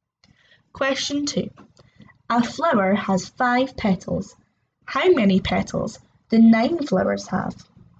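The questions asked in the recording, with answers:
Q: How many petals do 9 flowers have?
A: 45 petals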